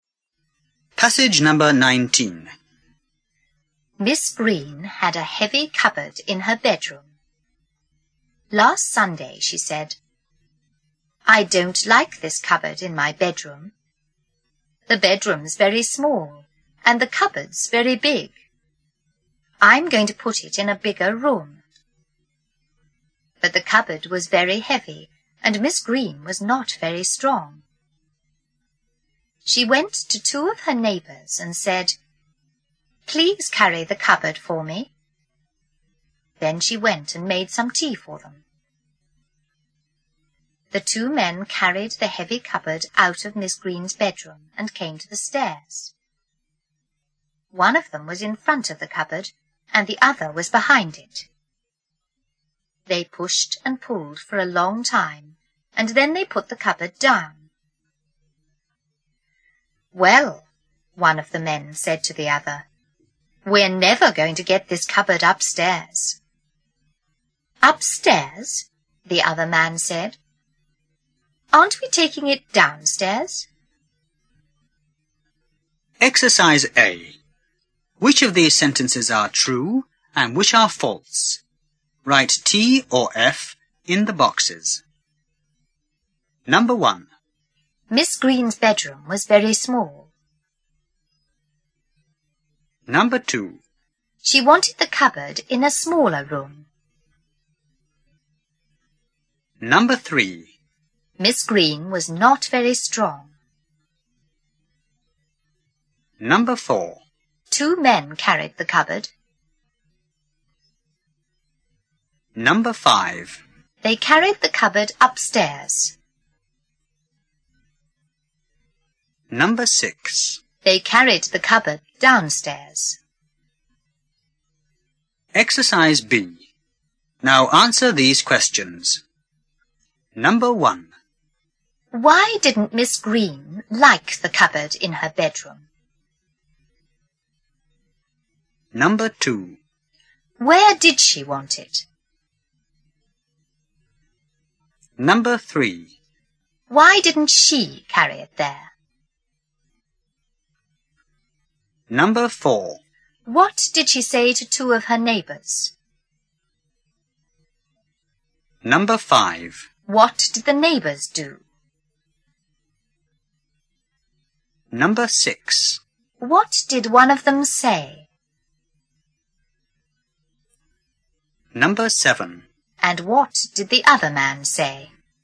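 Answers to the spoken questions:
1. True
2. False
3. True
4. True
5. False
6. False
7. The bedroom was very small and the cupboard was very big.
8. In a bigger room.
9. It was very heavy and she was not very strong.
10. Please carry the cupboard for me.
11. They carried the cupboard out of her bedroom to the stairs, pushed and pulled, then put it down.
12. We're never going to get this cupboard upstairs.
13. Upstairs? Aren't we taking it downstairs?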